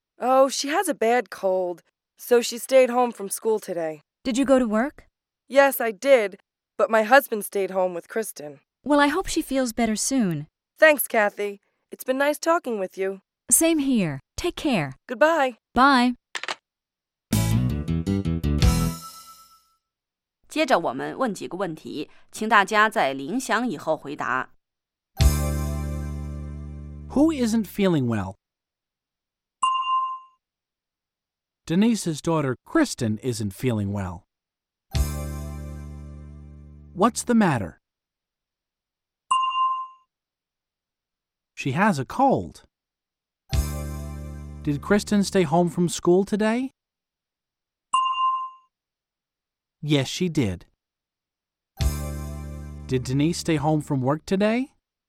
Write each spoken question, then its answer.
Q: Who isn't feeling well?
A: Denise's daughter, Kristen, isn't feeling well.